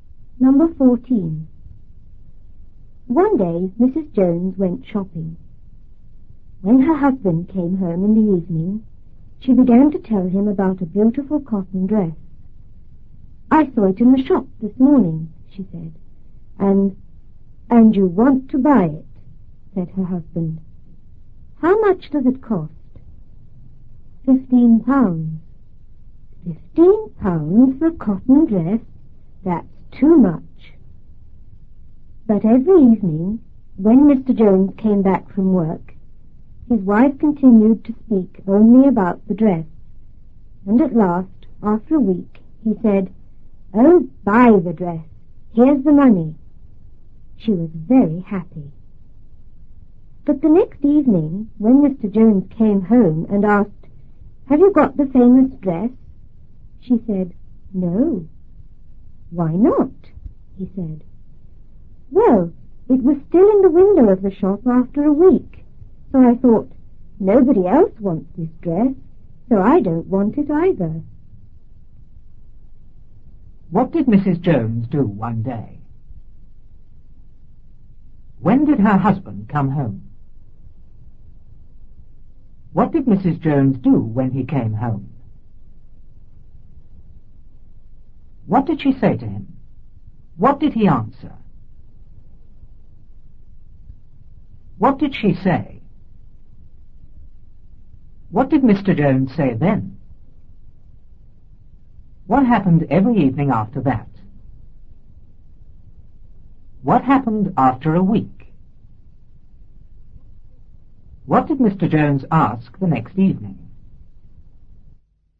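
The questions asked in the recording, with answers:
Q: What did Mrs. Jones do one day?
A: She went shopping.

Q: When did her husband come home?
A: In the evening.

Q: What did Mrs. Jones do when he came home?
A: She began to tell him about a beautiful cotton dress.

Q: What did she say to him?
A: "I saw it in the shop this morning."

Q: What did he answer?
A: "And you want to buy it. How much does it cost?"

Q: What did she say?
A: £15.

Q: What did Mr. Jones say then?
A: £15 for a cotton dress? That's too much.

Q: What happened every evening after that?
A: His wife kept talking only about the dress.

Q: What happened after a week?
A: He told her to buy the dress and gave her the money.

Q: What did Mr. Jones ask the next evening?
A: "Have you got the famous dress?"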